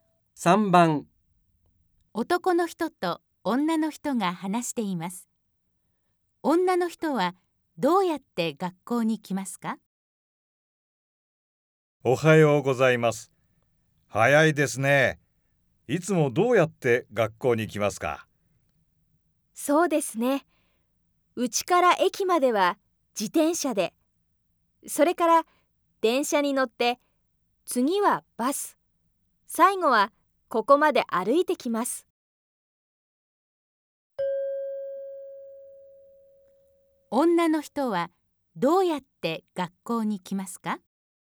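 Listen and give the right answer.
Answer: 自転車で駅まで行き、電車、バスに乗って、最後は歩いて来ます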